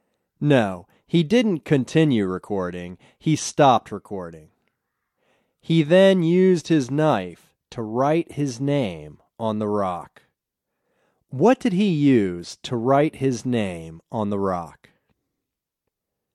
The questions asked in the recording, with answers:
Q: What did he use to write his name on the rock?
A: He used his knife to write his name on the rock.